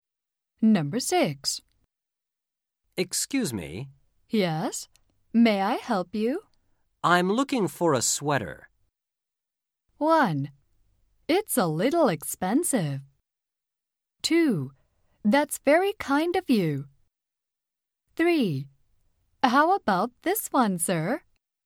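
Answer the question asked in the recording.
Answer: 3: How about this one, sir?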